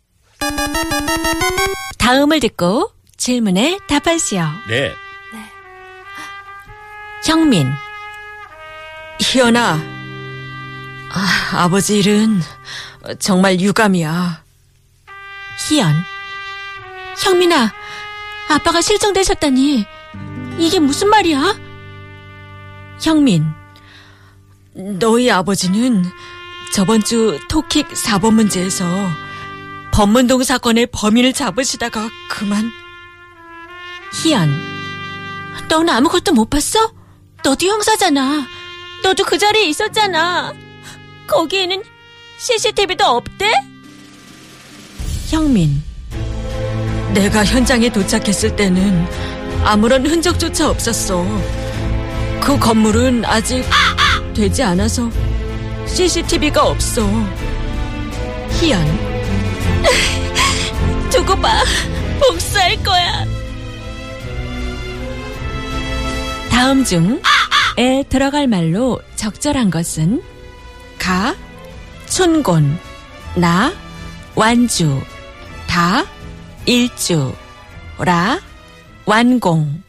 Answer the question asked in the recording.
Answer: We chose La. 그 건물은 아직 완공되지 않아서 CCTV가 없어.